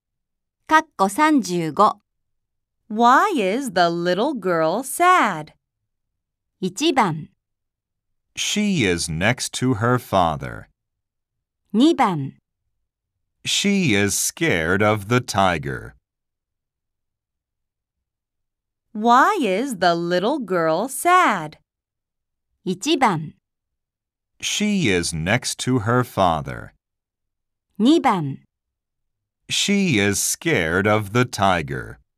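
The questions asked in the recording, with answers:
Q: Why is the little girl sad?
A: 2: She is scared of the tiger.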